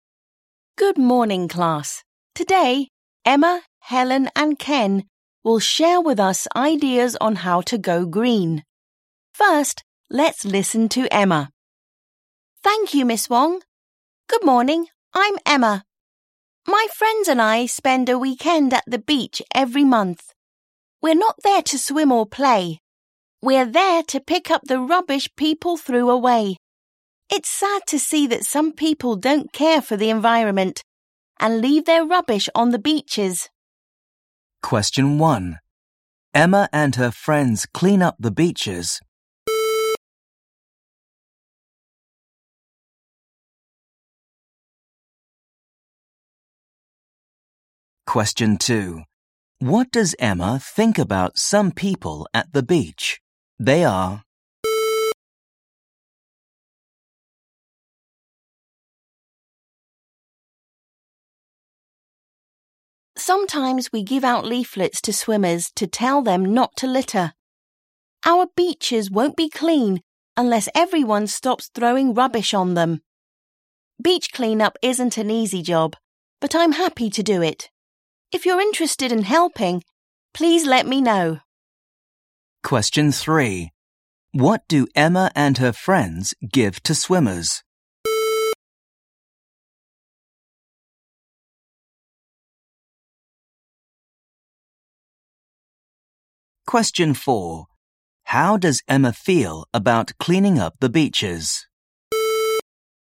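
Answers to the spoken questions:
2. They don't care for the environment
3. leaflets
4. happy to do it, though it isn't easy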